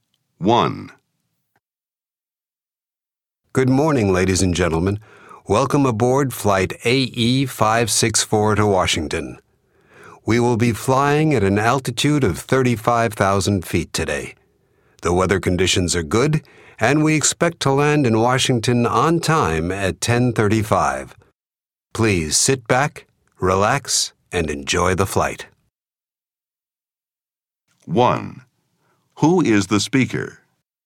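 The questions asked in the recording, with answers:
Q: Who is the speaker?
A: The pilot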